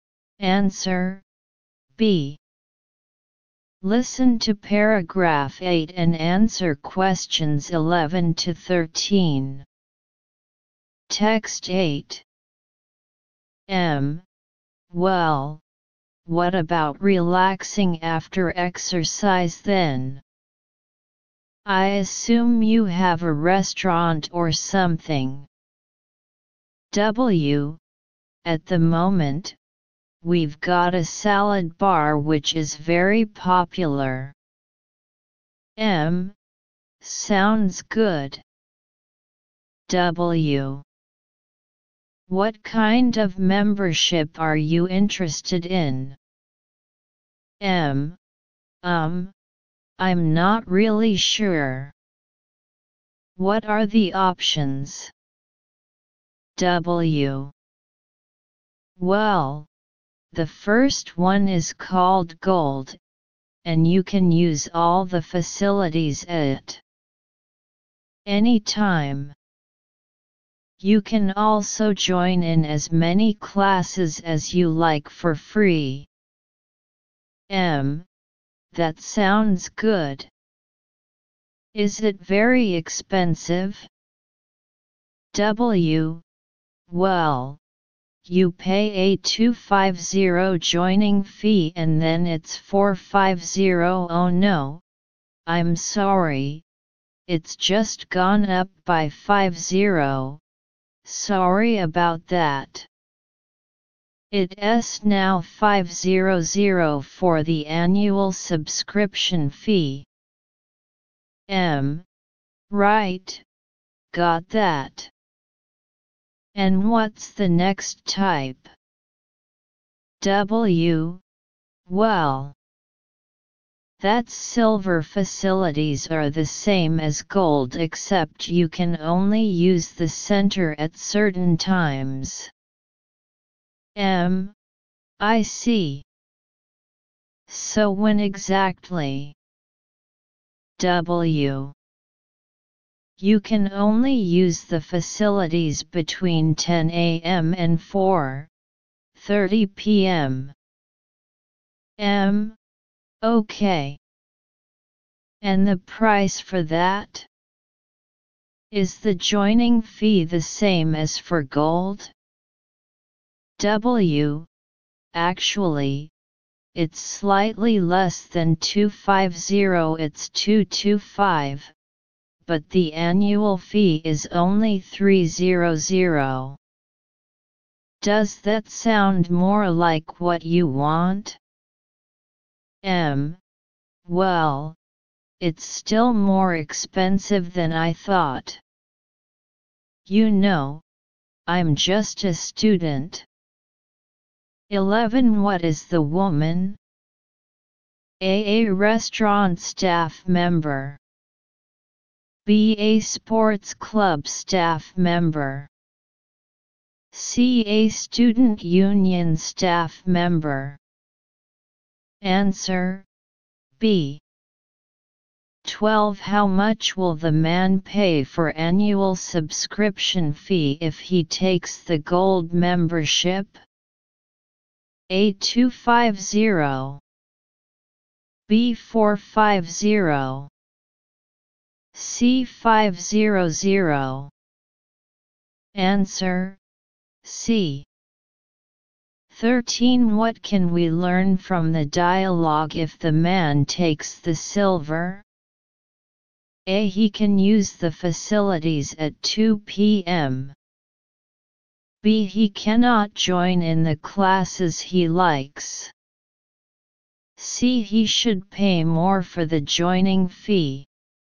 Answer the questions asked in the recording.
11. Answer B.
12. Answer C
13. Answer A.